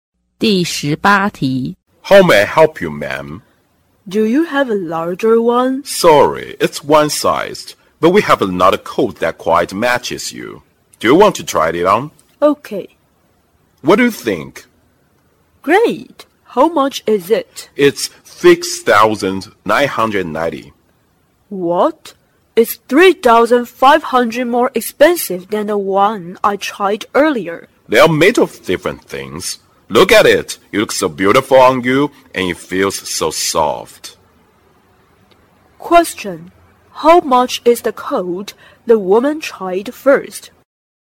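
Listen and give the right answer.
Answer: 3,490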